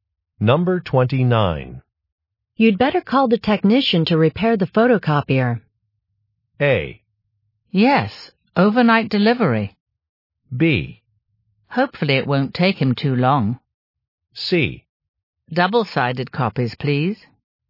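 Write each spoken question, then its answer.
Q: You'd better call the technician to repair the photocopier.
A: B: Hopefully it won't take him too long.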